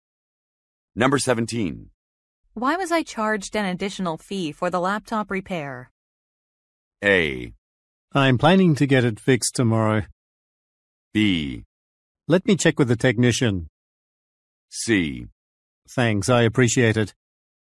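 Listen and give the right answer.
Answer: B: Let me check with the technician.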